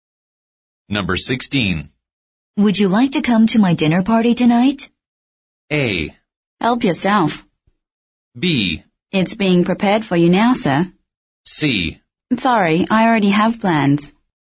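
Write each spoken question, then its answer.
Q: Would you like to come to my dinner party tonight?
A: C: Sorry, I already have plans.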